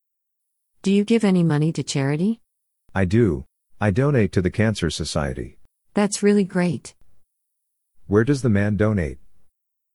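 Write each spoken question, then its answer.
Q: Where does the man donate?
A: The Cancer Society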